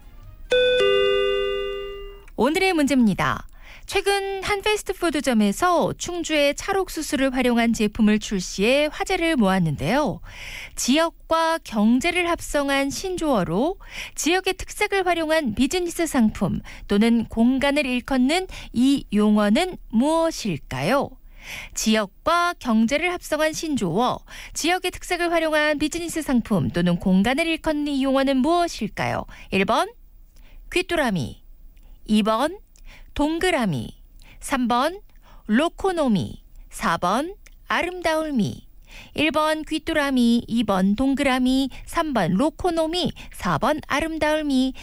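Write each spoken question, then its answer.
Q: 지역과 경제를 합성한 신조어로 지역의 특색을 활용한 비즈니스 상품 또는 공간을 일컫는 이 용어는 무엇일까요?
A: 3: 로코노미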